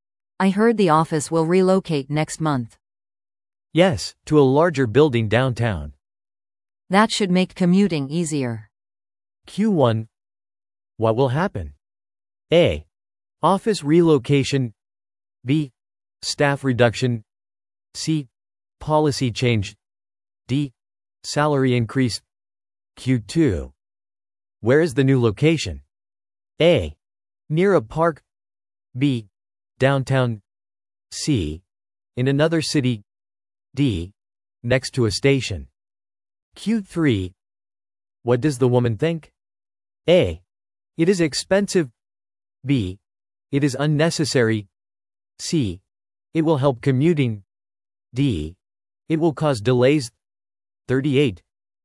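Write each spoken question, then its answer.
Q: What will happen?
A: A: Office relocation.

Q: Where is the new location?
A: B: Downtown.

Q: What does the woman think?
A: C: It will help commuting.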